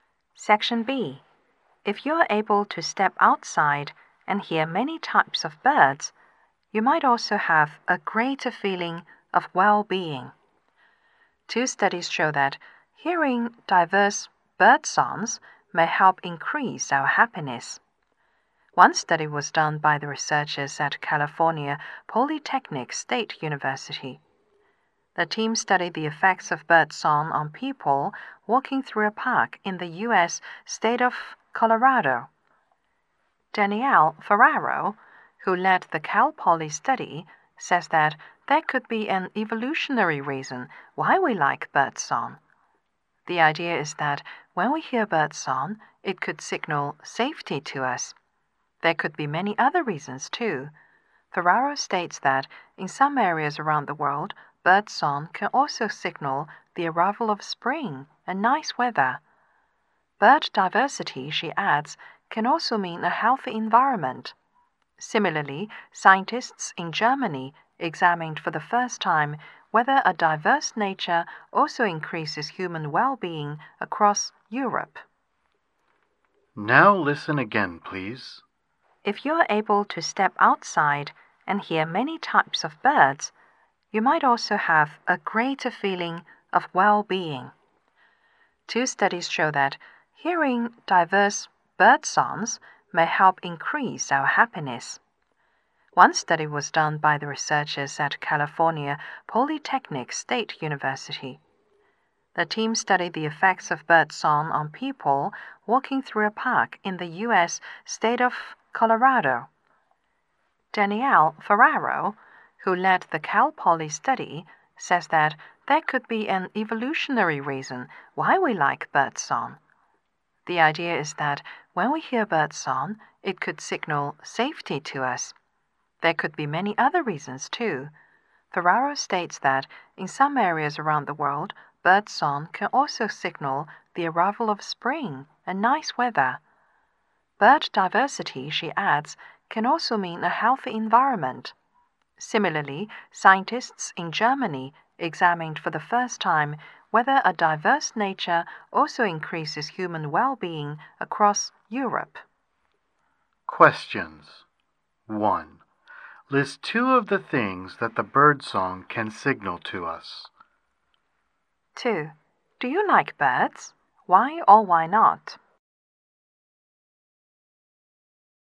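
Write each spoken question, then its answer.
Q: List 2 of the things that the birdsong can signal to us.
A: Safety and the arrival of spring and nice weather (also a healthy environment)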